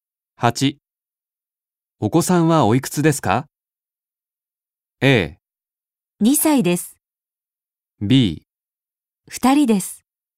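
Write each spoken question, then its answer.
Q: お子さんはおいくつですか?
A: A: 2歳です。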